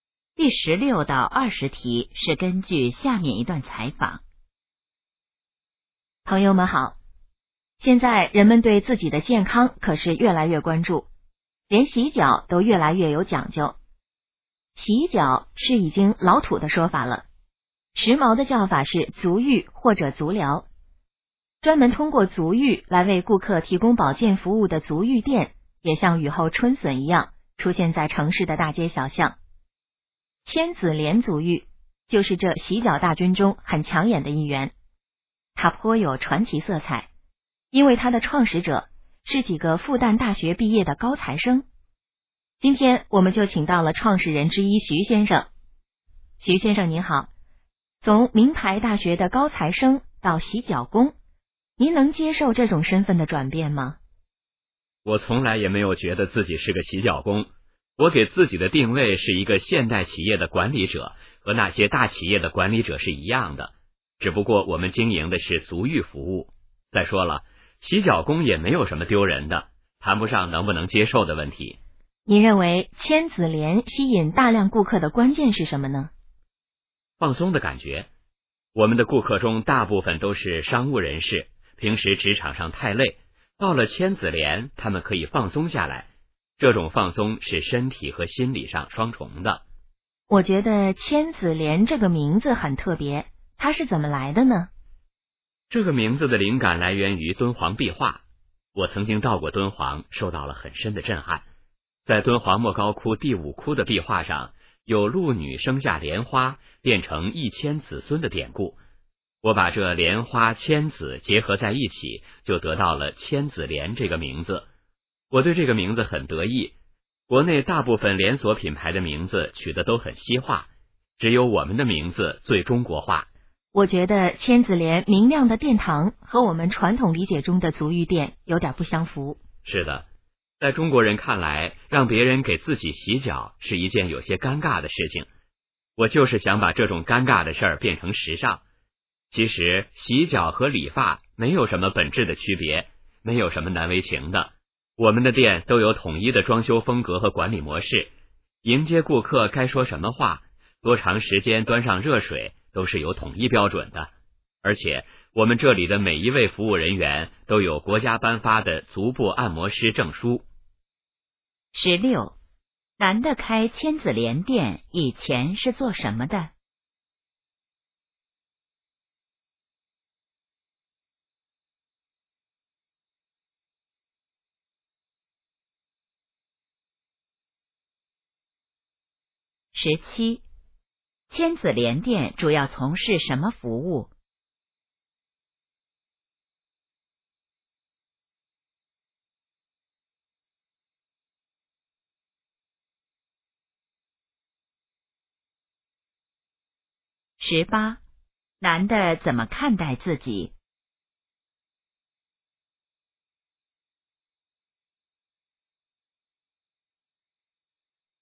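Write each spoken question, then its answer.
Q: 男的开千子莲店以前是做什么的?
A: 复旦大学毕业的高材生(学生)

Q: 千子莲店主要从事什么服务?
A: 足浴服务

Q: 男的怎么看待自己?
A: 现代企业的管理者

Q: 千子莲这个名字来自什么?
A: 敦煌壁画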